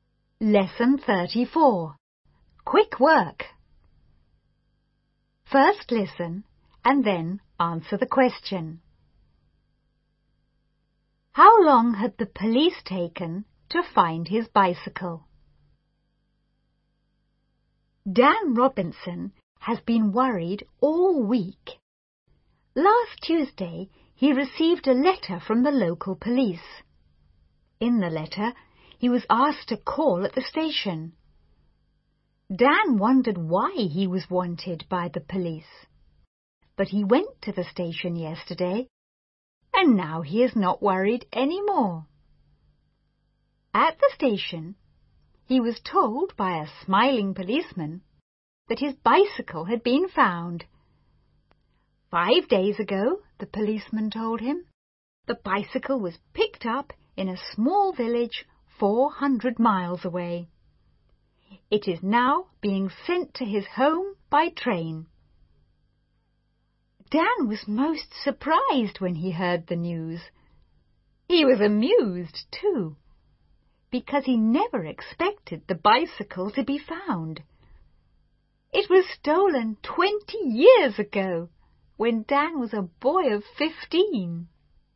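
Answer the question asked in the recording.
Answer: About 20 years (it was stolen 20 years ago)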